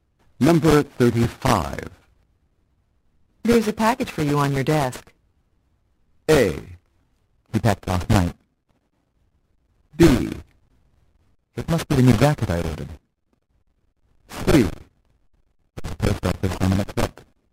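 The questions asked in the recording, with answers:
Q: There's a package for you on your desk.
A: B: It must be the new jacket I ordered.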